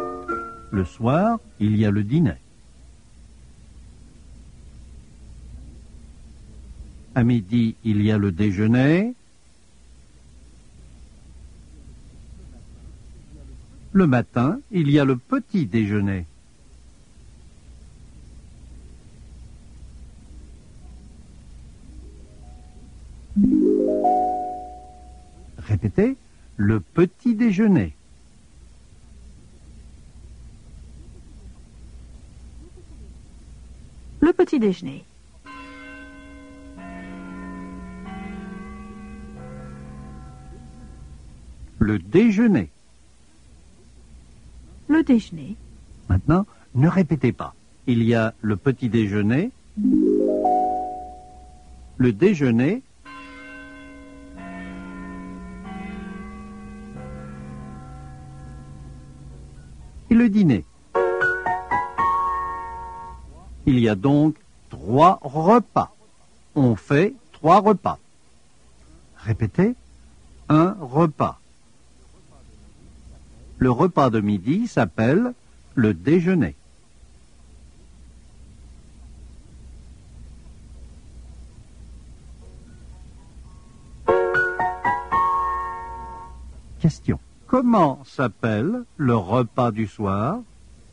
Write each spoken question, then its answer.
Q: Comment s'appelle le repas du soir?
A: Le repas du soir s'appelle le dîner.